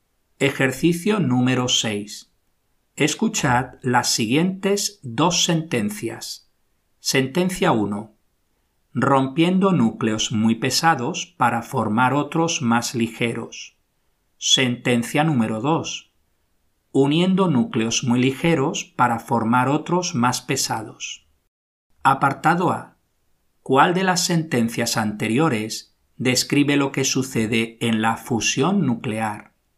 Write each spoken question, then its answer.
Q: Apartado A. ¿Cuál de las sentencias anteriores describe lo que sucede en la fusión nuclear?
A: Uniendo núcleos muy ligeros para formar otros más pesados.